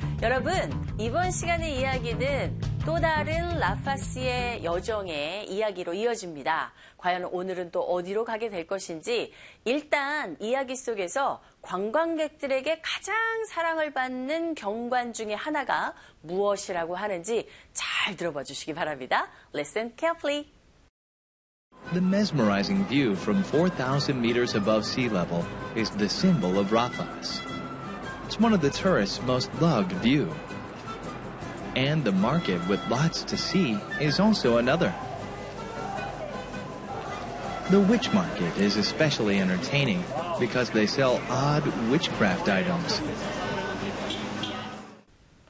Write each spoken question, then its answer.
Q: 일단 이야기 속에서 관광객들에게 가장 사랑을 받는 경관 중에 하나가 무엇이라고 하는지 잘 들어봐 주시기 바랍니다.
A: 일단 해발 4,000m의 경관, 그 어떤 전망, 이런 것이 가장 관광객들에게 사랑받는 경관이라고 들었어야 됩니다, 여러분.